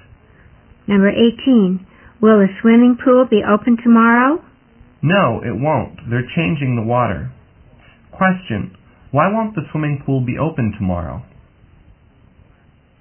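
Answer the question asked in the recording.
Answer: They're changing the water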